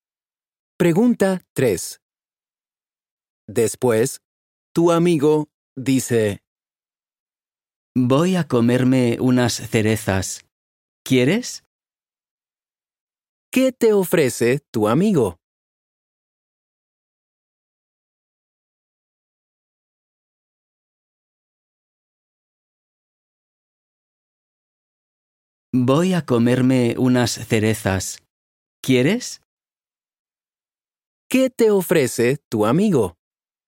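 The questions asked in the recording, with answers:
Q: ¿Qué te ofrece tu amigo?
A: Unas cerezas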